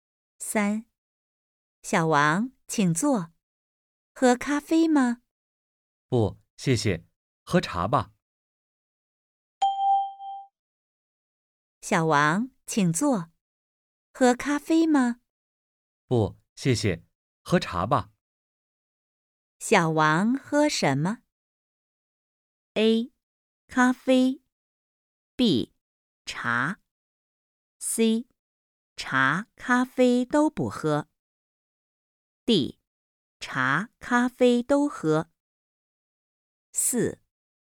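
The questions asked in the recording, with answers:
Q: 小王喝什么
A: B: 茶。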